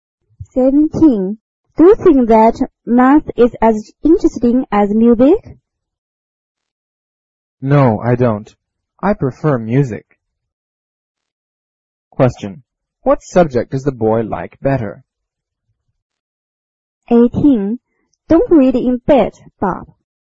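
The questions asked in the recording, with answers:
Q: What subject does the boy like better?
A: Music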